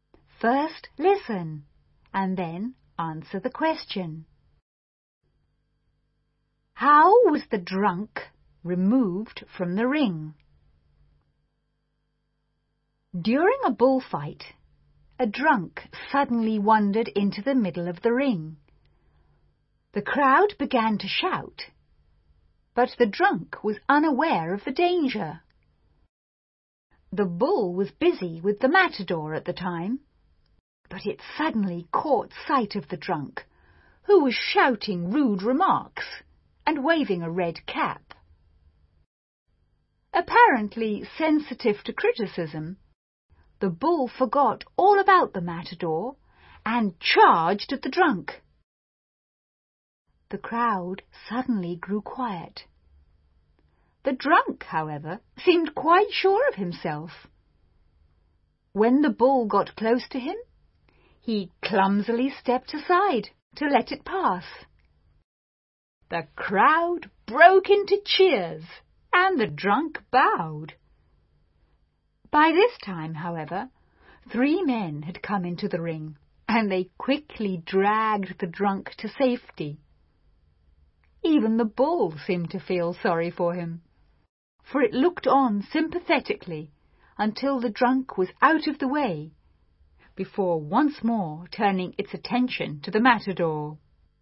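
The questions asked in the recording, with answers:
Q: How was the drunk removed from the ring?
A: Three men came into the ring and quickly dragged him to safety.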